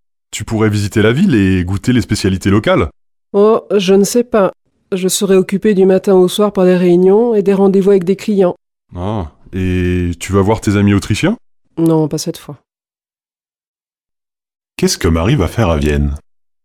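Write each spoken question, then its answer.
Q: Qu'est-ce que Marie va faire à Vienne ?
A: Elle va travailler (réunions et rendez-vous avec des clients).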